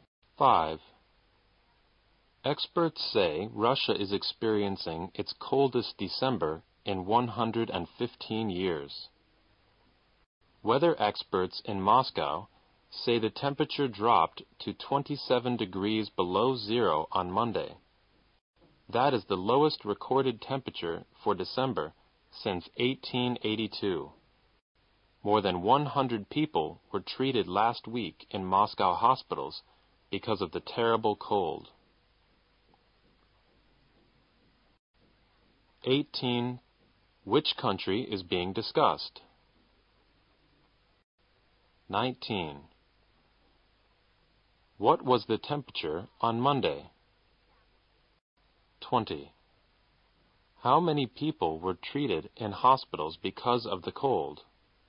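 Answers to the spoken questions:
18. Russia
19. 27 degrees below zero
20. More than 100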